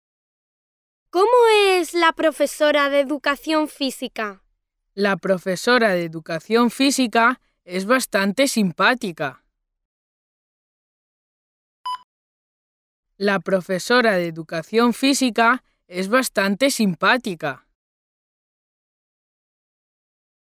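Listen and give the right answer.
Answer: bastante simpática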